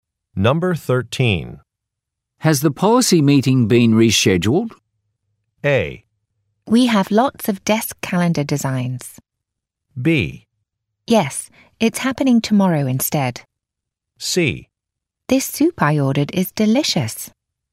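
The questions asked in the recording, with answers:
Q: Has the policy meeting been rescheduled?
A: B: Yes, it's happening tomorrow instead.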